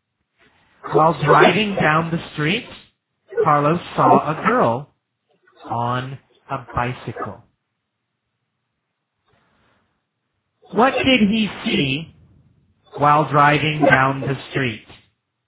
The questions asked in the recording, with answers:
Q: What did he see while driving down the street?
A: He saw a girl on a bicycle while driving down the street.